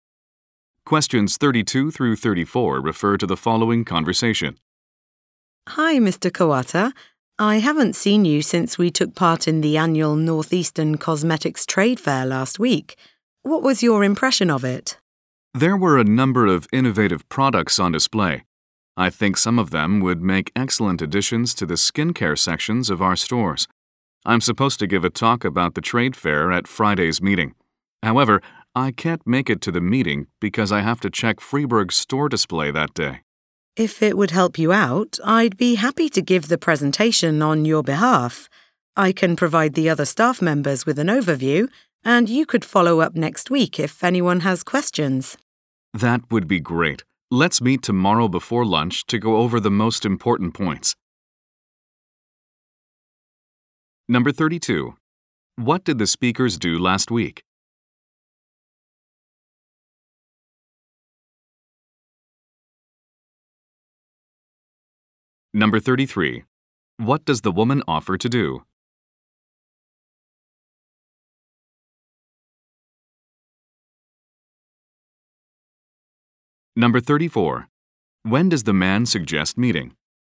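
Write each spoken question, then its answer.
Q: What did the speakers do last week?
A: Took part in a cosmetics trade fair

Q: What does the woman offer to do?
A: Give the presentation on his behalf

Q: When does the man suggest meeting?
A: Tomorrow before lunch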